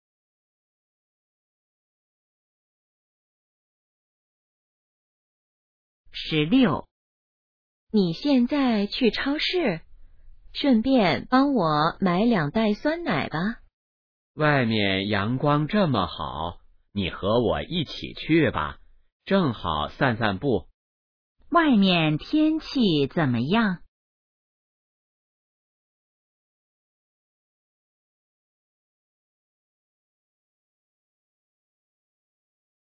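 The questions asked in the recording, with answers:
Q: 外面天气怎么样?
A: 阳光很好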